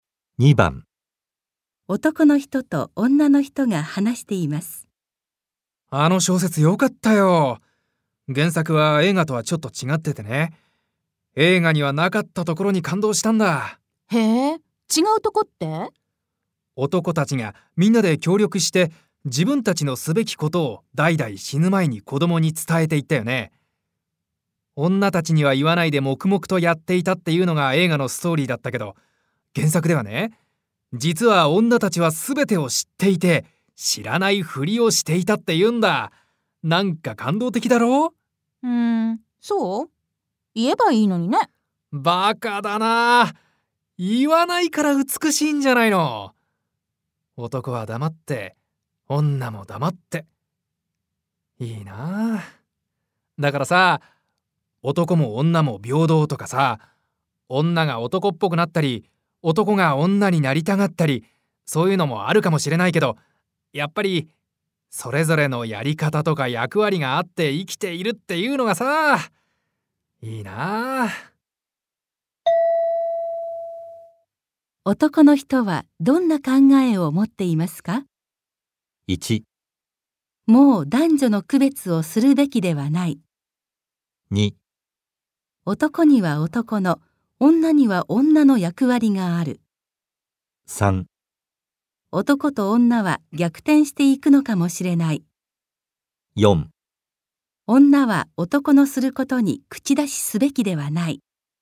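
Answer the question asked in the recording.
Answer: 2: 男には男の、女には女の役割がある。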